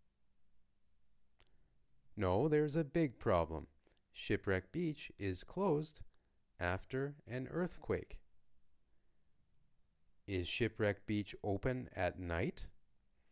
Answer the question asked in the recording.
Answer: No, Shipwreck Beach isn't open at night or during the day.